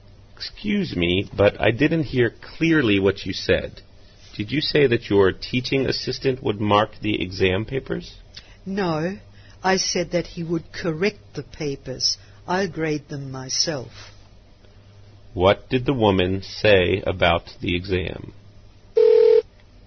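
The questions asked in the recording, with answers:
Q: What did the woman say about the exam?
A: The assistant will correct the papers, but she will grade them herself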